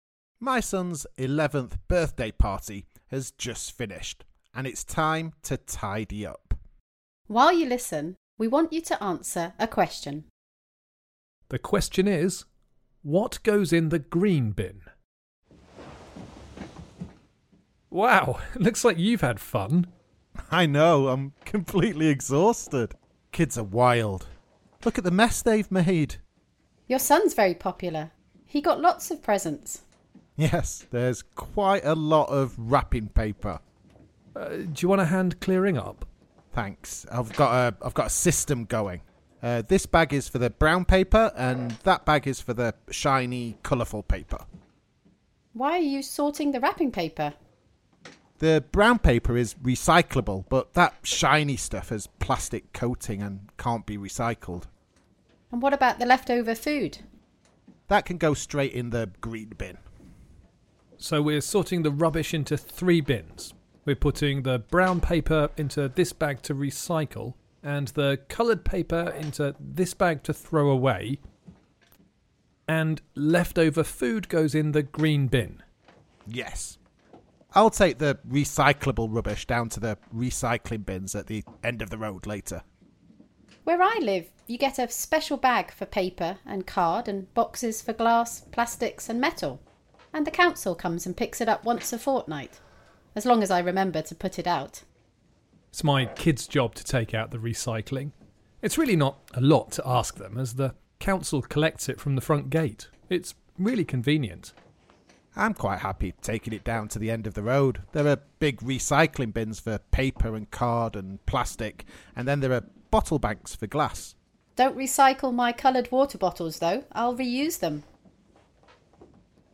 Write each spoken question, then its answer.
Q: The question is, what goes in the green bin?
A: Leftovers. Leftover food.